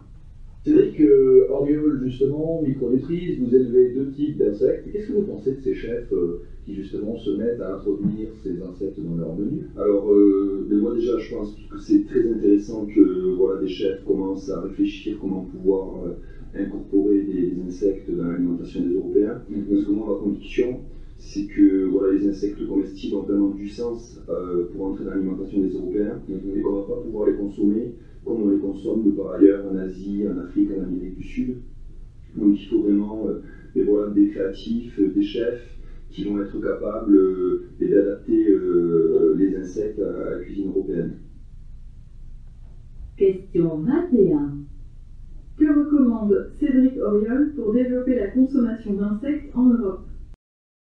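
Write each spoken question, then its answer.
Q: Que recommande Cédric Auriol pour développer la consommation d'insectes en Europe?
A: Que des chefs créatifs adaptent les insectes à la cuisine européenne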